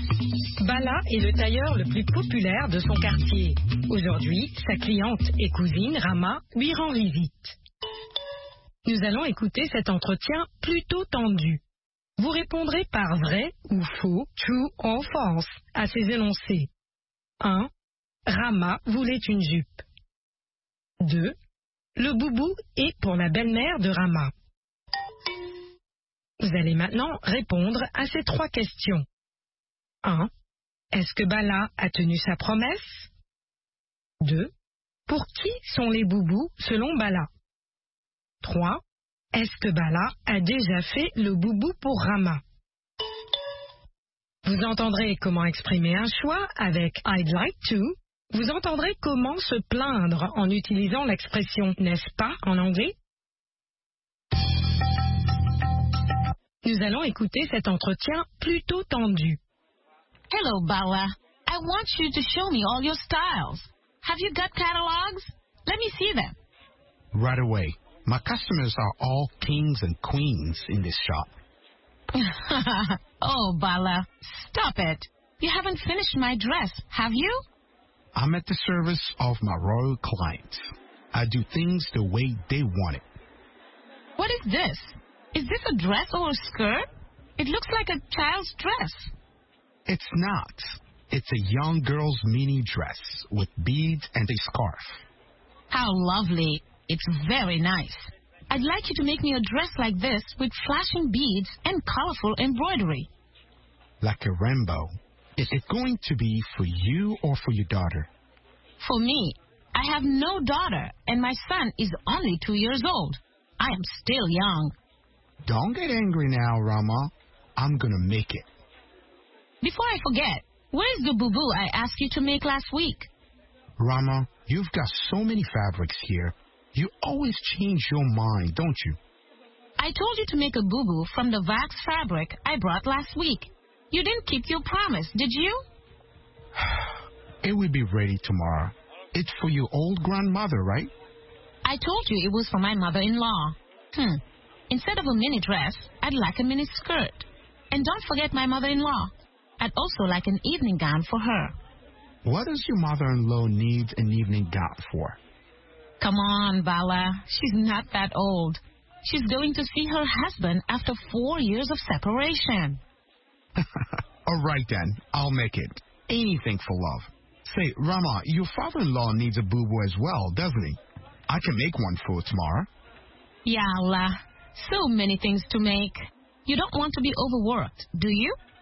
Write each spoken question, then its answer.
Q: Le boubou est pour la belle-mère de Rama.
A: L'énoncé 2 est vrai.

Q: Est-ce que Bala a tenu sa promesse?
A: Non.

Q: Pour qui sont les boubous selon Bala?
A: Pour les personnes âgées.

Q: Est-ce que Bala a déjà fait le boubou pour Rama?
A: Pas encore.